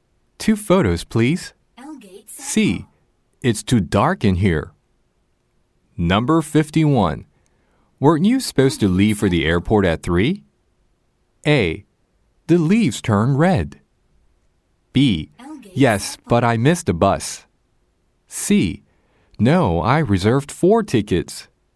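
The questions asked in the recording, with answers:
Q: Weren't you supposed to leave for the airport at 3?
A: B: Yes, but I missed a bus.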